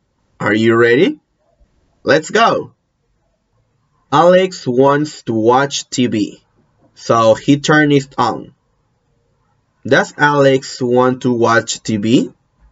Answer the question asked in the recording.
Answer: Yes, he wants to watch TV.